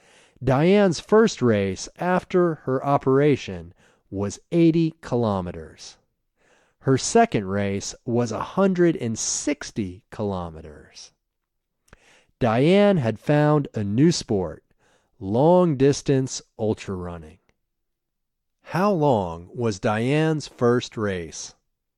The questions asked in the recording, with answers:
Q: How long was Diane's first race?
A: Her first race was 80 kilometers.